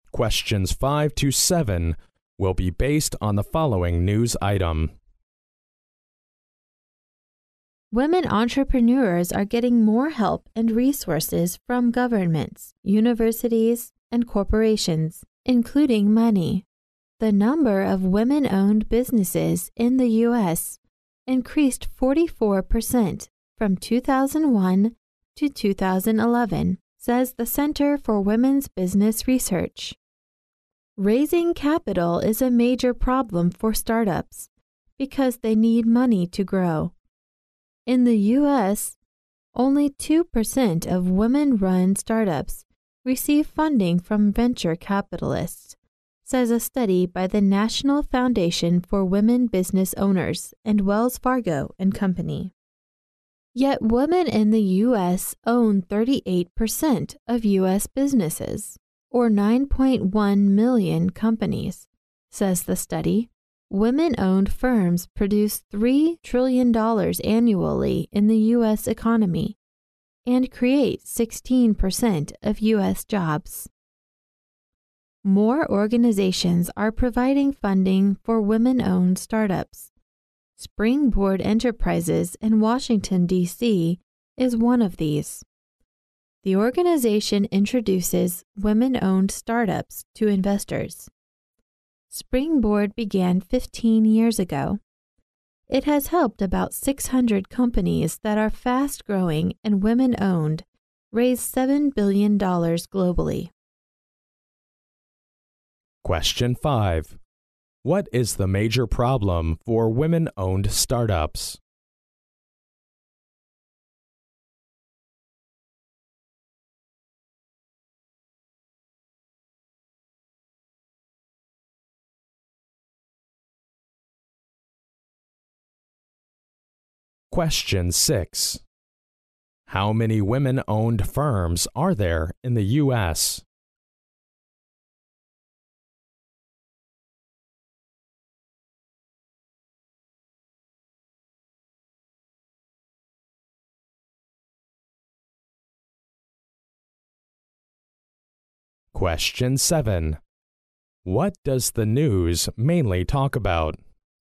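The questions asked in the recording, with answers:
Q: What is the major problem for women-owned startups?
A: Raising capital (getting money to grow)

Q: How many women-owned firms are there in the U.S.?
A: 9.1 million

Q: What does the news mainly talk about?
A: Women entrepreneurs getting more help and funding for their startups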